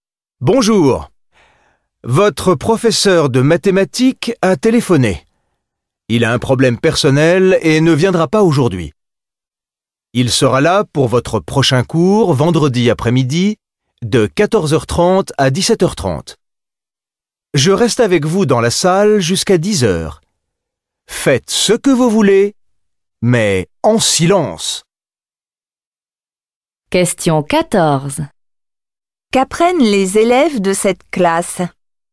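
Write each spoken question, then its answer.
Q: Qu'apprennent les élèves de cette classe ?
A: Leur professeur de mathématiques est absent aujourd'hui.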